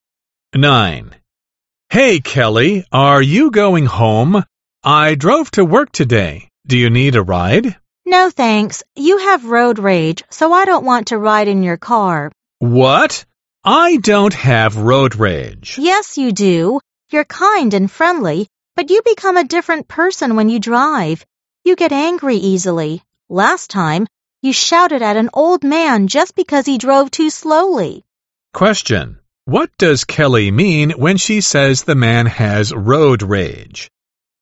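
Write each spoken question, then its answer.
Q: What does Kelly mean when she says the man has road rage?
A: He gets angry easily when he drives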